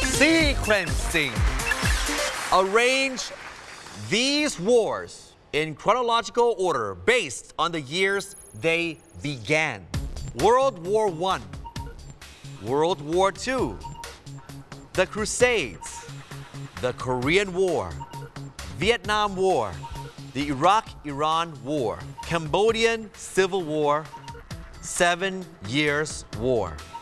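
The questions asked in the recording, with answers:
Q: Arrange these wars in chronological order based on the years they began.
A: The Crusades, Seven Years War, World War I, World War II, Korean War, Vietnam War, Cambodian Civil War, Iraq-Iran War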